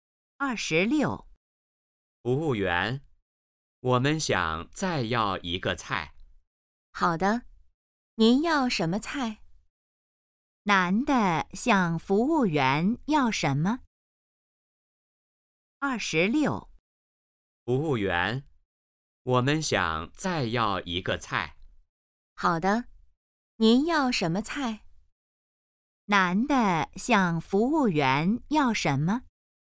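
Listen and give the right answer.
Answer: 再要一个菜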